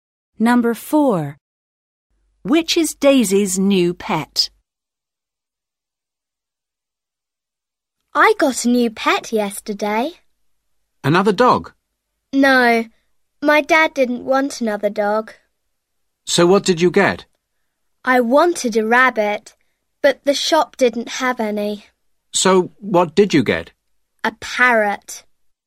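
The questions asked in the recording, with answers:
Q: Which is Daisy's new pet?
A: A parrot.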